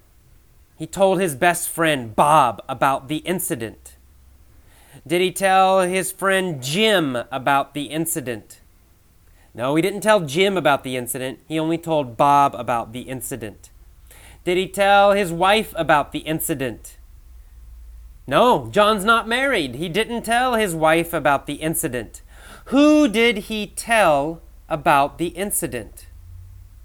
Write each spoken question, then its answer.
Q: Who did he tell about the incident?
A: He told Bob about the incident.